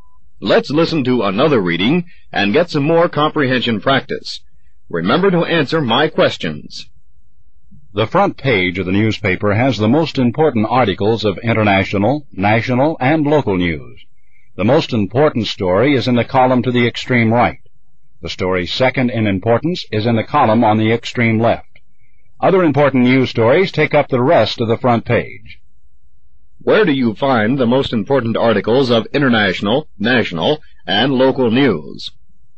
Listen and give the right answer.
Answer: On the front page.